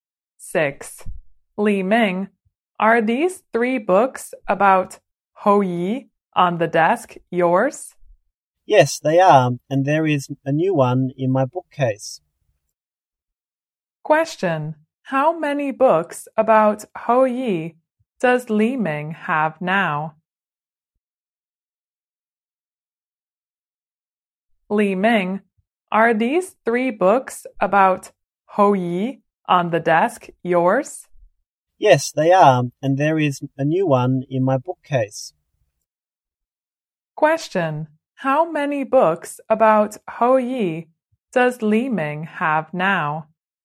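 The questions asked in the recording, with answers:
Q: how many books about Hoyi does Li Ming have now?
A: Four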